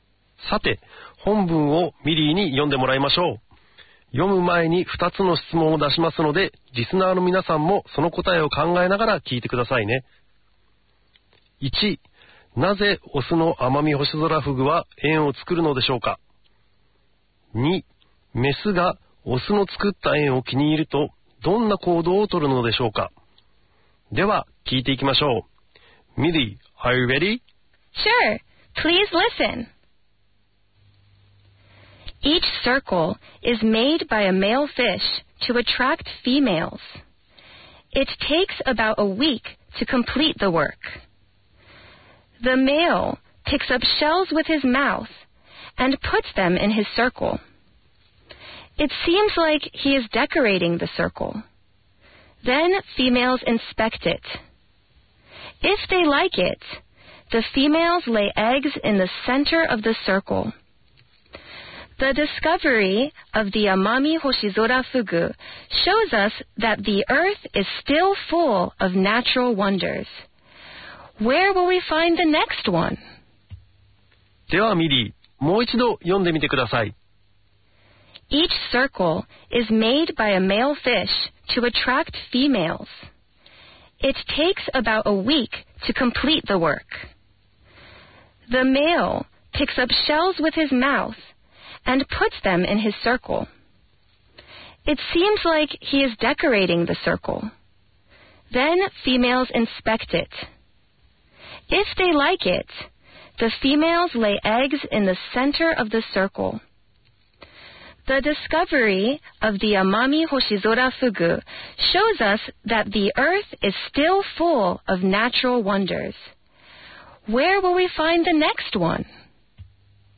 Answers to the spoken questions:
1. メスを引きつけるために作っているんですね。
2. メスがオスの作った円を気に入ると、円の中心に卵を産むんですね。